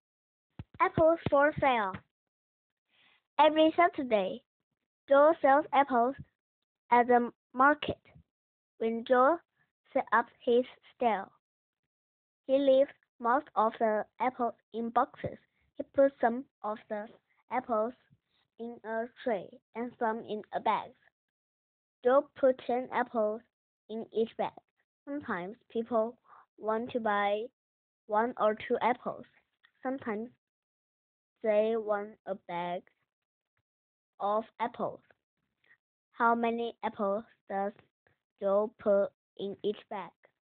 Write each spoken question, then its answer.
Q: How many apples does Joel put in each bag?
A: Joel put 10 apples in each bag.